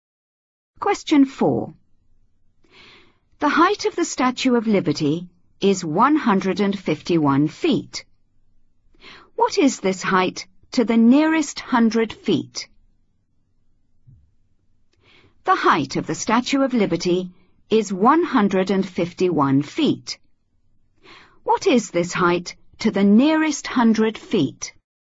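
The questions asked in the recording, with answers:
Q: What is this height to the nearest 100 feet?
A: 200 feet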